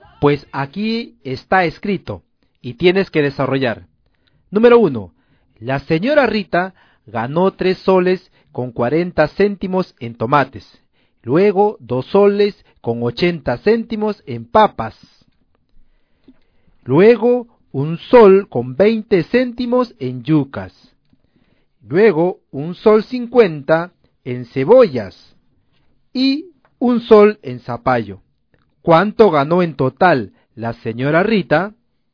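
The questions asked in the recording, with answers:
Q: ¿Cuánto ganó en total la señora Rita?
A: 9,90 soles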